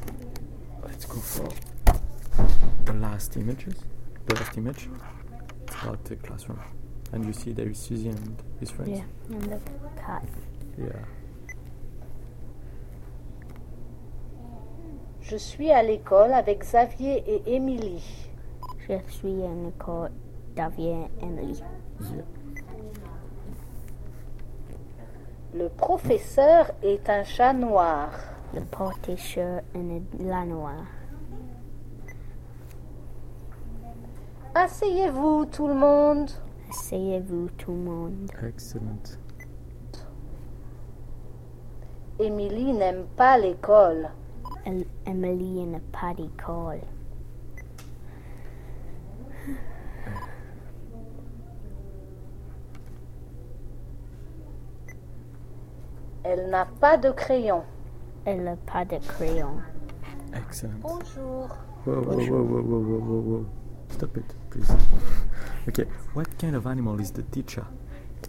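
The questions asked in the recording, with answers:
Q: what kind of animal is the teacher?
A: A cat (a black cat)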